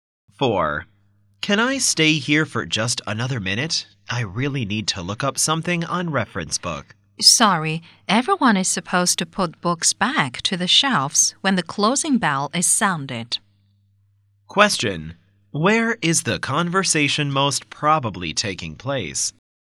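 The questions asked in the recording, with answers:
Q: Where is the conversation most probably taking place?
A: In a library.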